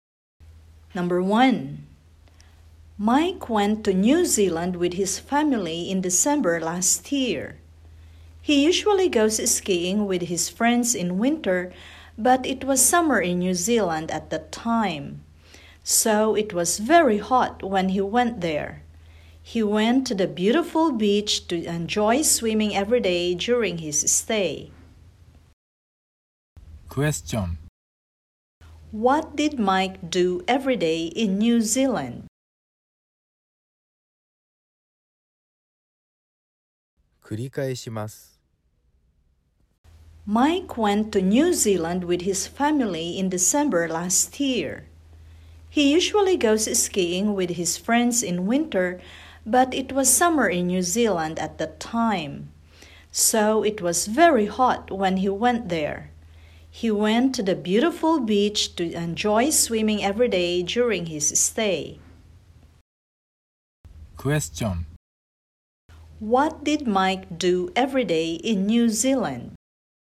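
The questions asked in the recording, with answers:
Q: What did Mike do every day in New Zealand?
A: He went swimming at the beach.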